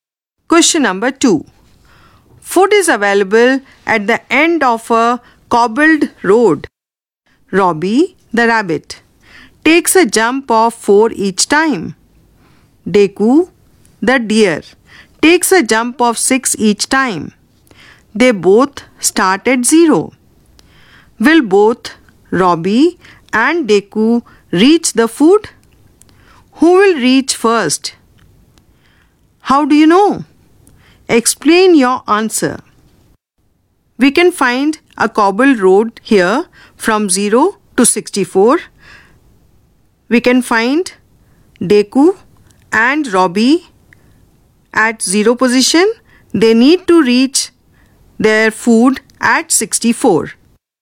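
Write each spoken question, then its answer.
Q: Will both Robbie and Deku reach the food?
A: No, only Robbie reaches 64 (multiple of 4, not 6)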